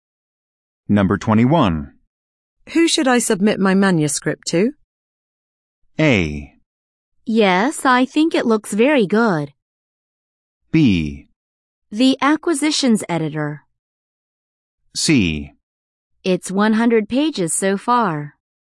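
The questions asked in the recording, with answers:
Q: Who should I submit my manuscript to?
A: B: The acquisitions editor.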